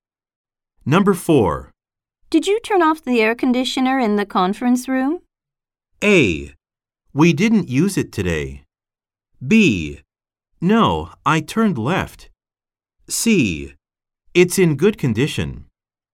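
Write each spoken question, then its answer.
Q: Did you turn off the air conditioner in the conference room?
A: A: We didn't use it today.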